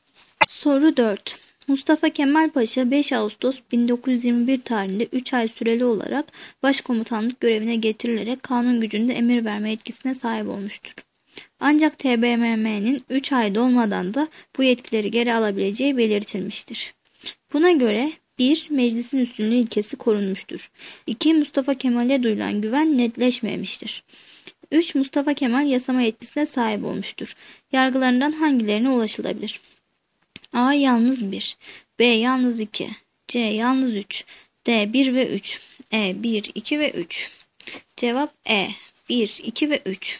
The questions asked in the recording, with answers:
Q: Yargılarından hangilerine ulaşılabilir?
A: Cevap E. 1, 2 ve 3.